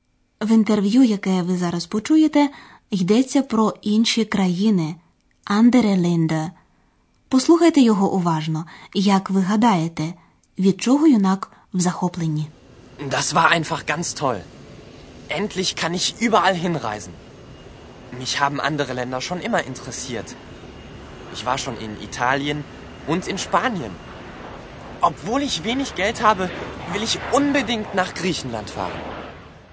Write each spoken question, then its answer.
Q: Як ви гадаєте, від чого юнак в захопленні?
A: Юнак у захваті, бо він нарешті може скрізь подорожувати.